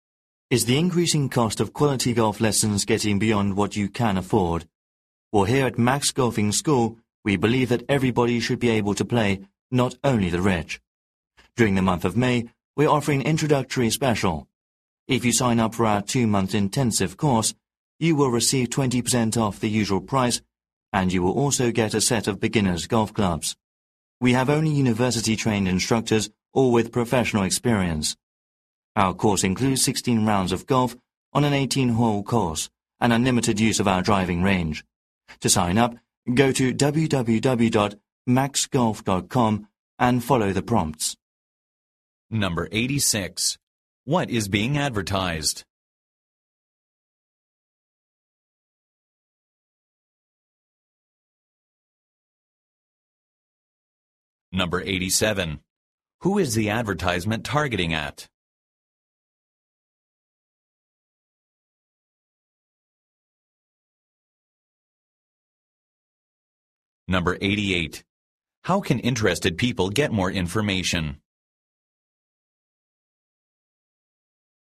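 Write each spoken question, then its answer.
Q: What is being advertised?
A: Golf lessons (a 2-month intensive course at Max Golfing School)

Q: How can interested people get more information?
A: By visiting www.maxgolf.com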